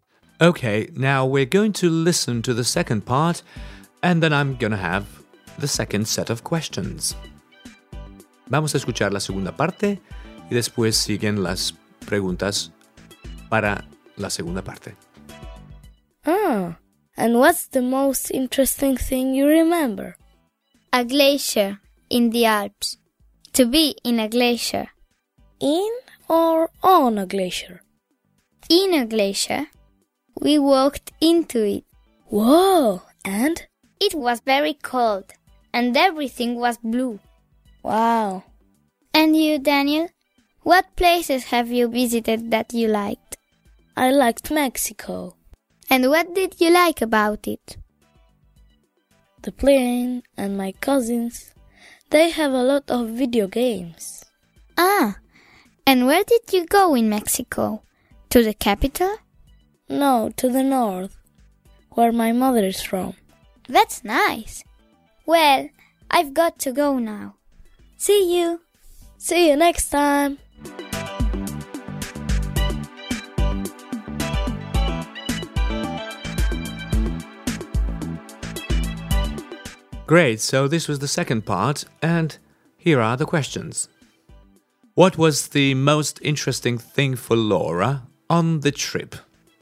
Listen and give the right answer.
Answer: Well, it was to be in a glacier.